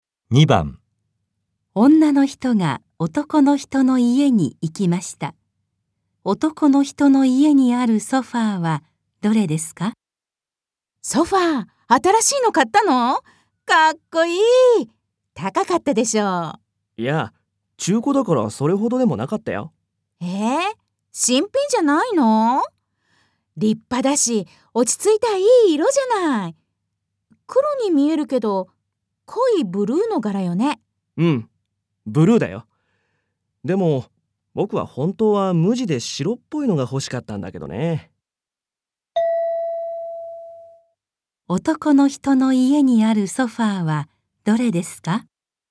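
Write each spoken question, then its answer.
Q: 男の人の家にあるソファーはどれですか?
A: 中古の、濃いブルーの柄のソファー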